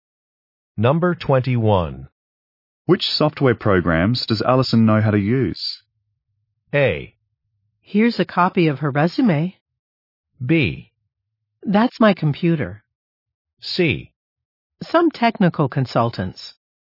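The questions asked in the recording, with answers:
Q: Which software programs does Allison know how to use?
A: A: Here's a copy of her resume.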